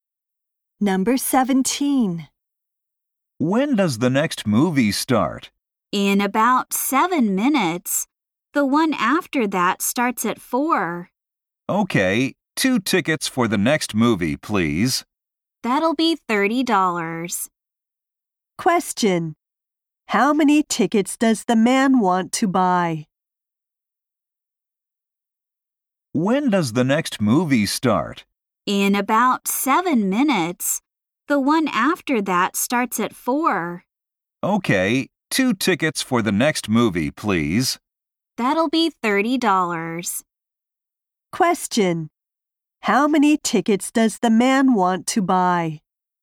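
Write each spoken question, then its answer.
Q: How many tickets does the man want to buy?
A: Two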